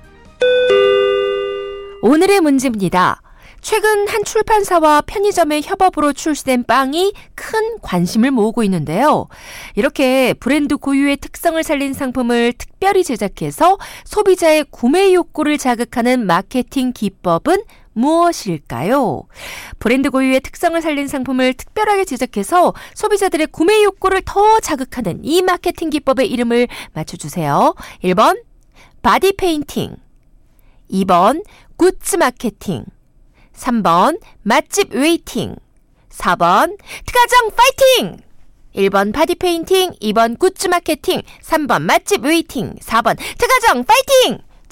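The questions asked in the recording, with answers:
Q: 브랜드 고유의 특성을 살린 상품을 특별하게 제작해서 소비자들의 구매 욕구를 더 자극하는 이 마케팅 기법의 이름을 맞춰주세요.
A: 2: 굿즈 마케팅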